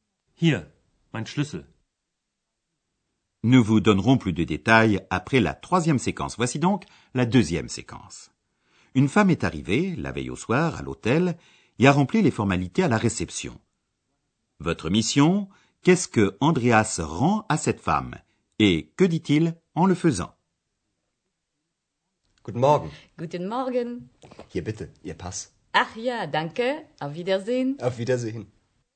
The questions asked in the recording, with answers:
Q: Votre mission, qu'est-ce que Andreas rend à cette femme? Et que dit-il en le faisant?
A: Andreas rend à cette dame son passeport, qu'il avait pris la veille au soir pour le fichier de police.